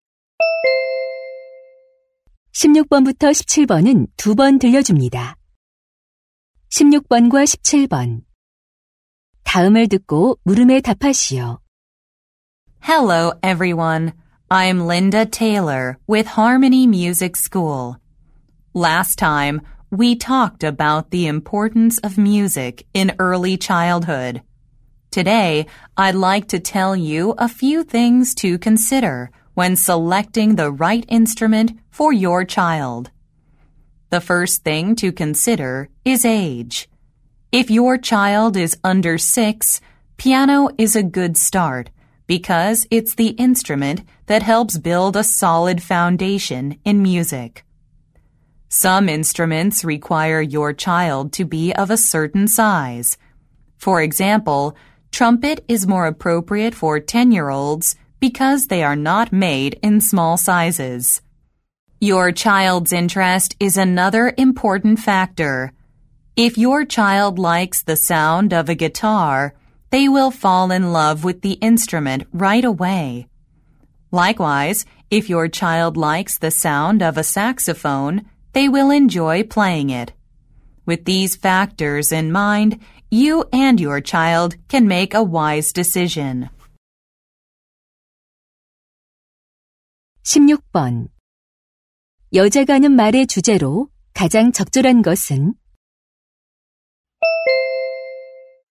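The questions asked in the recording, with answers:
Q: 여자가 하는 말의 주제로 가장 적절한 것은?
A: 아이에게 맞는 악기를 고를 때 고려할 사항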